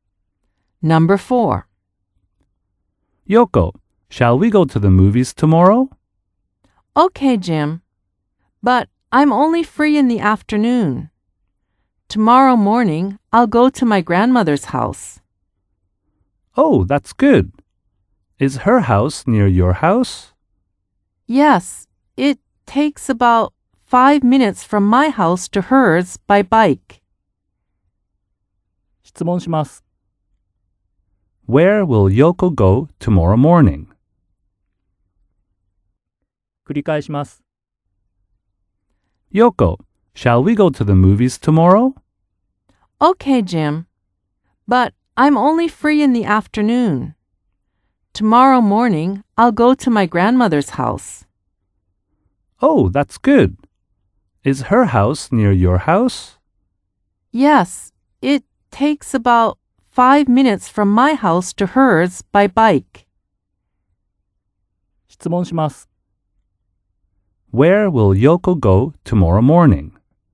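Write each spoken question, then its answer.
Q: Where will Yoko go tomorrow morning?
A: To her grandmother's house.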